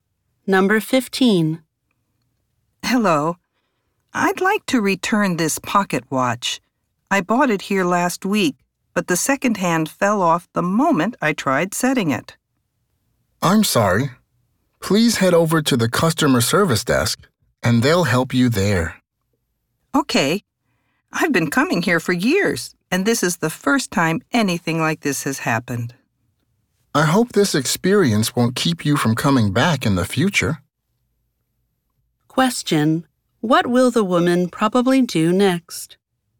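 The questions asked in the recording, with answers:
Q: What will the woman probably do next?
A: Go to the customer service desk to return the pocket watch.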